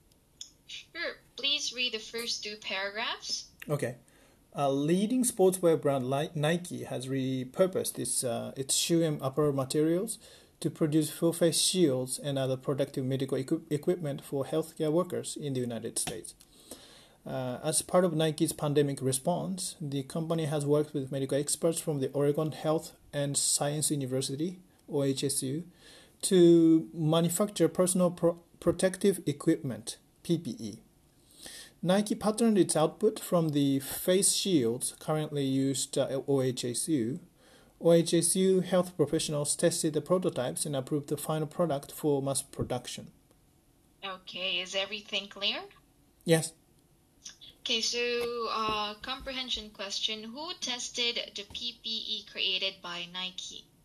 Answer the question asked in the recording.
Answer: Uh, the uh, OHSU, Oregon Health and Science University.